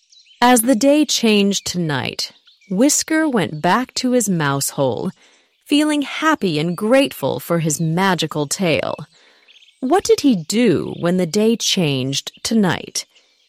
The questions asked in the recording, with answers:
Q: What did he do when the day changed to night?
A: He went back to his mouse hole.